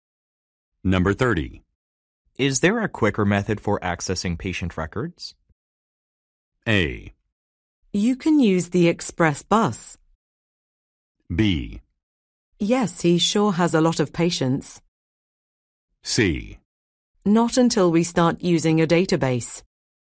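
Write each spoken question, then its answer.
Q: Is there a quicker method for accessing patient records?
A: C: Not until we start using a database.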